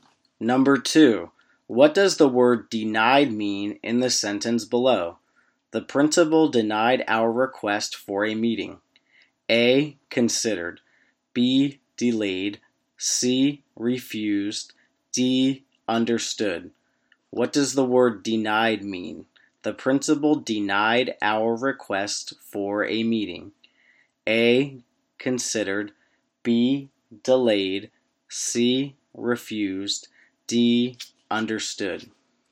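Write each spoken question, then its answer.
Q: what does the word denied mean in the sentence below?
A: C: refused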